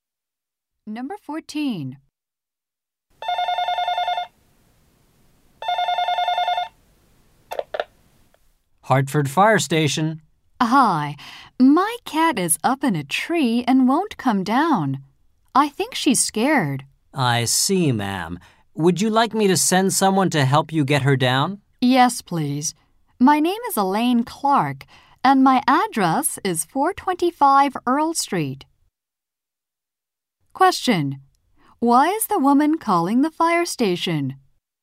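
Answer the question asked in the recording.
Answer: Her cat is stuck in a tree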